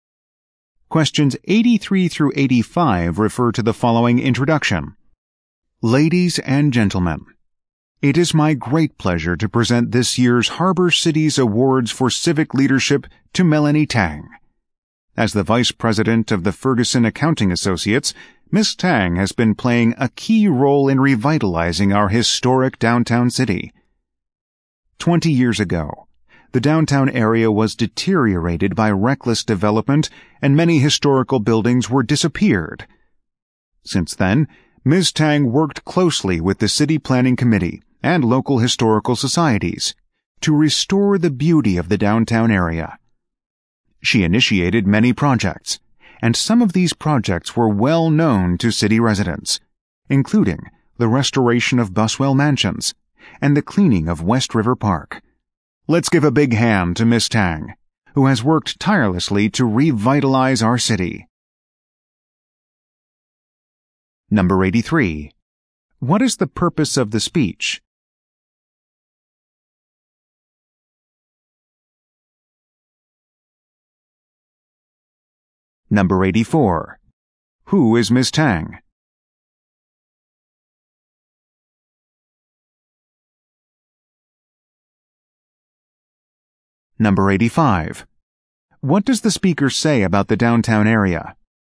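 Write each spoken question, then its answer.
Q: What is the purpose of the speech?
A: To present an award for civic leadership to Melanie Tang

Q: Who is Miss Tang?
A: The Vice President of Ferguson Accounting Associates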